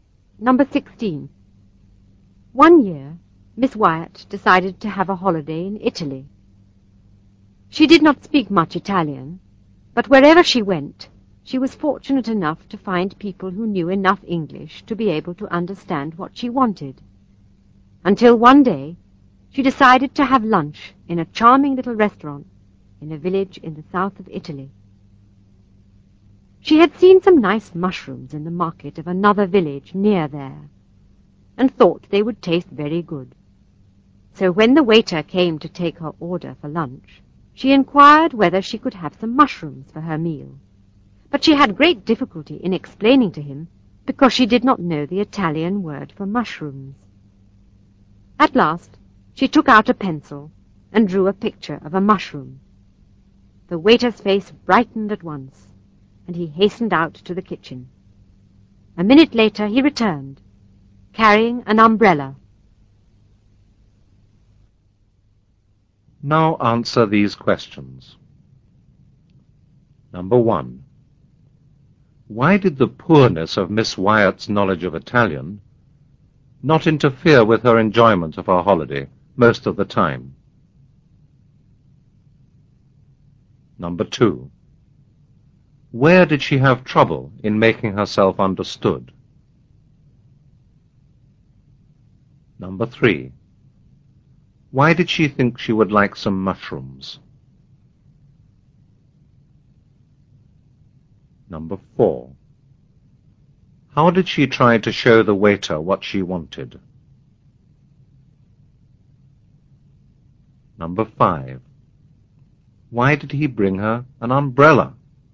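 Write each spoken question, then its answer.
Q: Why did the poorness of Miss Wyatt's knowledge of Italian not interfere with her enjoyment of her holiday most of the time?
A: Wherever she went, she found people who knew enough English to understand what she wanted.

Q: Where did she have trouble in making herself understood?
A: In a little restaurant in a village in the south of Italy.

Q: Why did she think she would like some mushrooms?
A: She had seen some nice mushrooms in the market of a nearby village.

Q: How did she try to show the waiter what she wanted?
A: She drew a picture of a mushroom.

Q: Why did he bring her an umbrella?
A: He thought her drawing of a mushroom was a picture of an umbrella.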